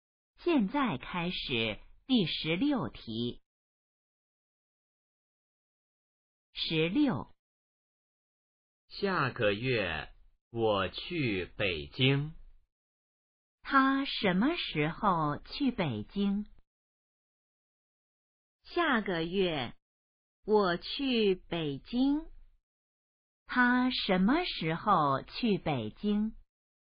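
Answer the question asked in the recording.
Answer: 下个月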